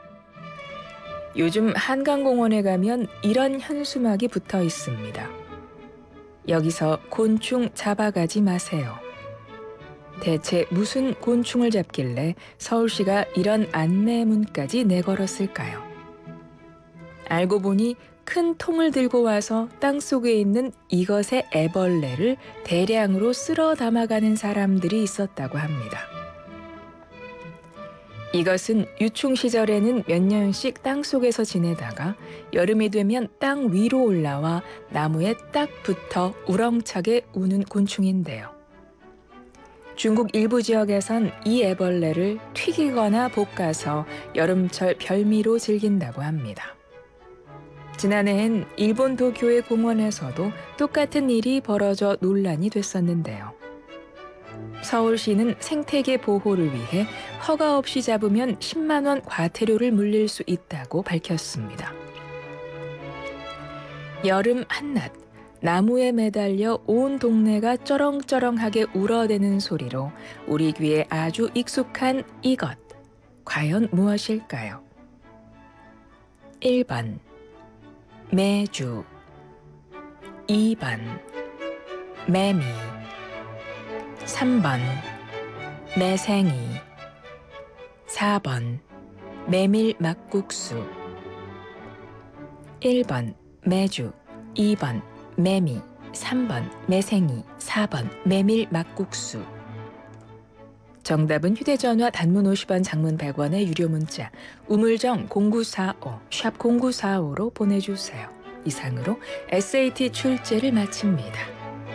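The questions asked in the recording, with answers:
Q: 여름 한낮, 나무에 매달려 온 동네가 쩌렁쩌렁하게 울어대는 소리로 우리 귀에 아주 익숙한 이것, 과연 무엇일까요?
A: 2: 매미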